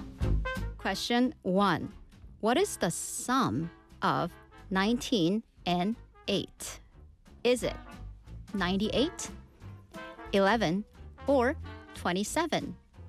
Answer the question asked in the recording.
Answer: 19 and 8, 27.